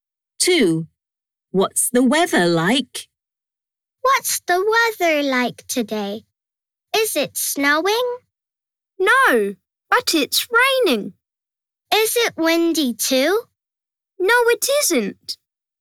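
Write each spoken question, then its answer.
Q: What's the weather like?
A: It's raining.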